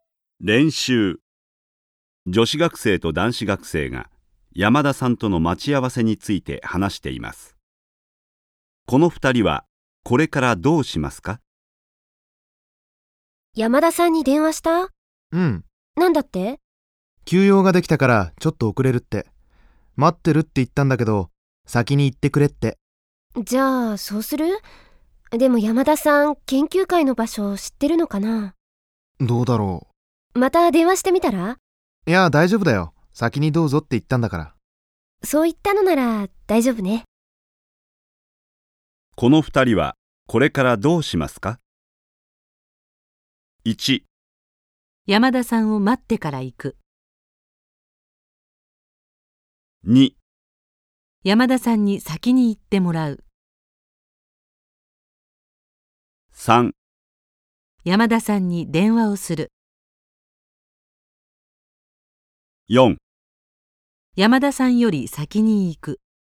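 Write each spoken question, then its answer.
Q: この二人はこれからどうしますか?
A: 4: 山田さんより先に行く。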